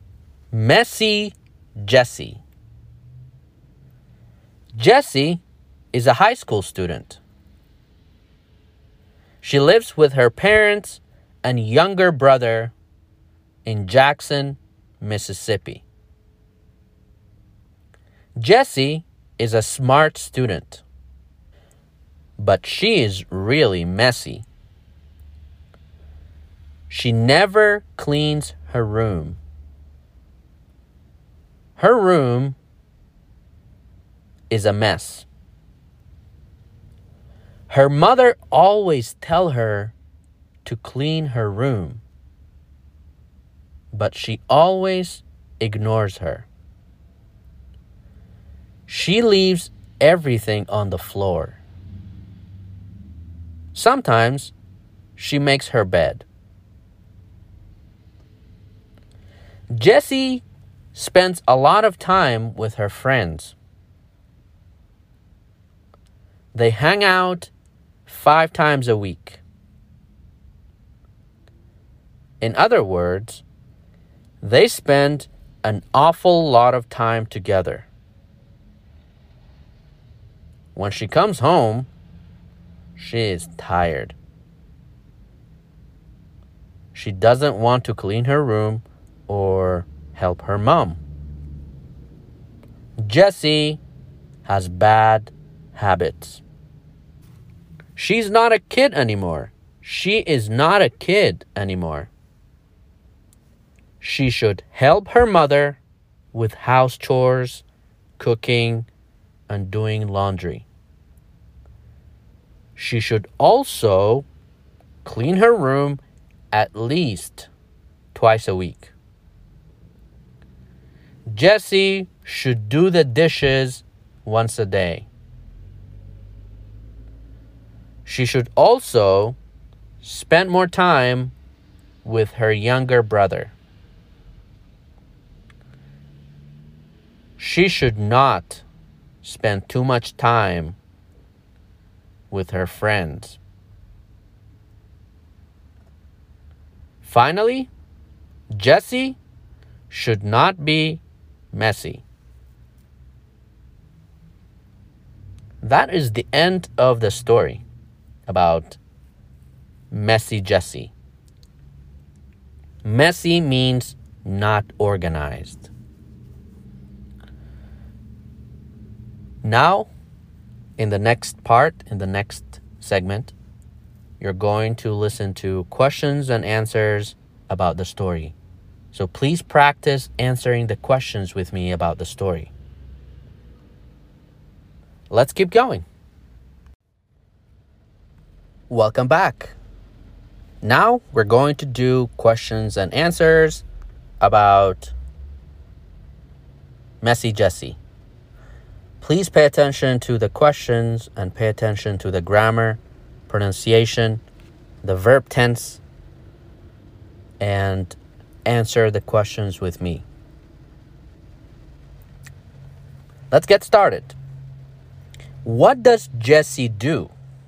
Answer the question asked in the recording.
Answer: She is in school, or she's a high school student, or she is a student.